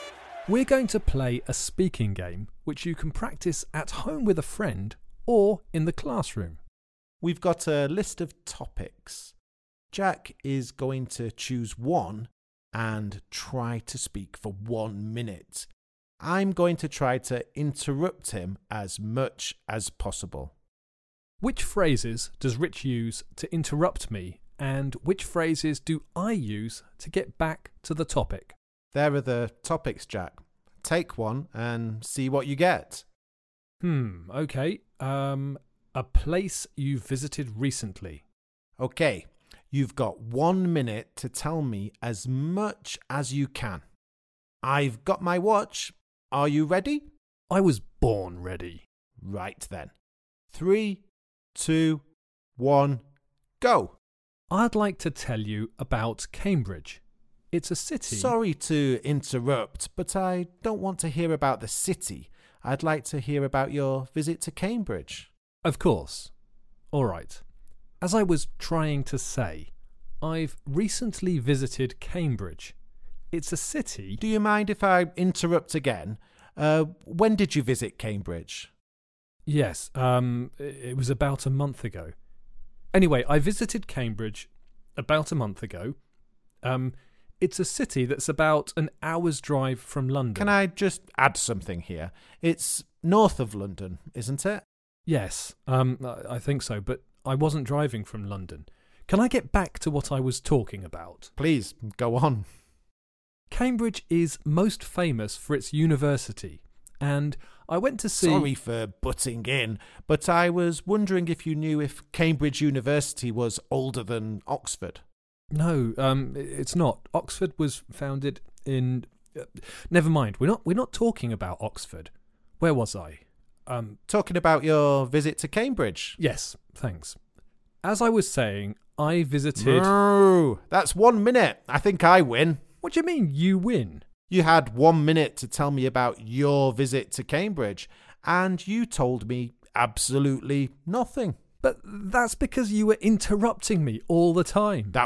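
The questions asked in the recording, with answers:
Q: Which phrases does Rich use to interrupt me, and which phrases do I use to get back to the topic?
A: Rich interrupts with: sorry to interrupt; do you mind if I interrupt again; can I just add something here; sorry for butting in. Jack gets back to the topic with: as I was trying to say; anyway; can I get back to what I was talking about; where was I; as I was saying.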